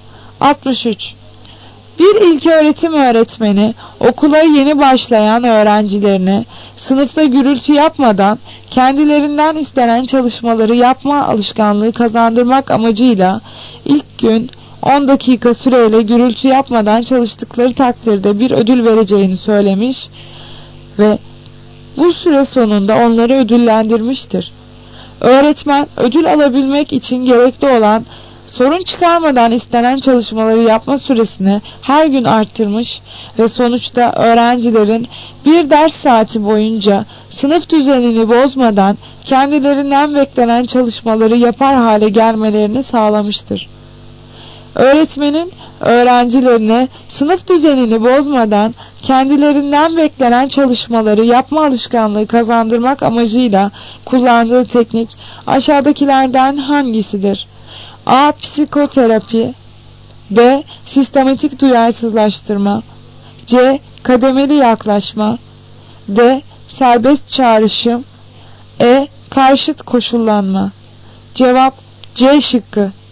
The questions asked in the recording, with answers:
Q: Öğretmenin öğrencilerine sınıf düzenini bozmadan kendilerinden beklenen çalışmaları yapma alışkanlığı kazandırmak amacıyla kullandığı teknik aşağıdakilerden hangisidir?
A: Cevap C şıkkı. Kademeli yaklaşma.